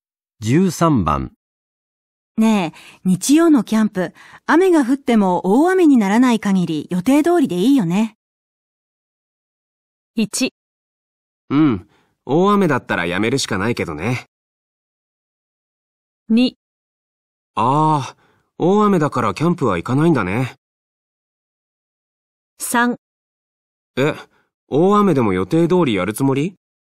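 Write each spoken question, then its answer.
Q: ねえ、日曜のキャンプ、雨が降っても大雨にならない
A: 1: うん、大雨だったらやめるしかないけどね。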